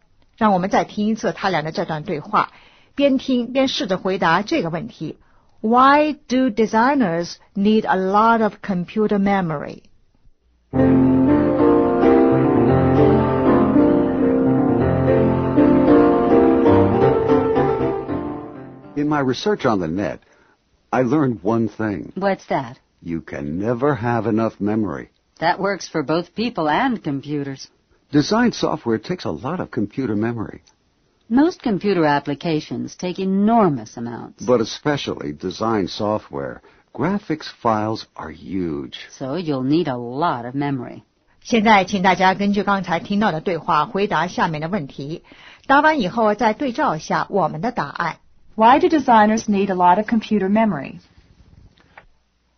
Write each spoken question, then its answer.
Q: Why do designers need a lot of computer memory?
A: Design software takes a lot of memory.